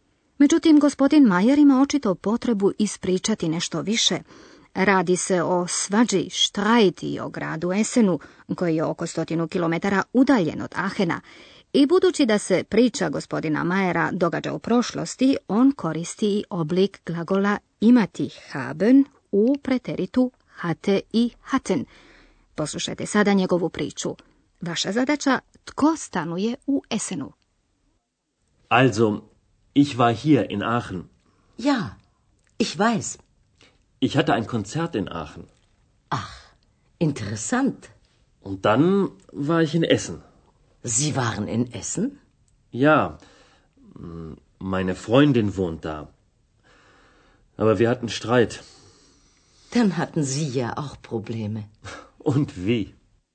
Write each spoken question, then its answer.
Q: Tko stanuje u Essenu?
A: U Esenu stanuje prijateljica gospodina Majera.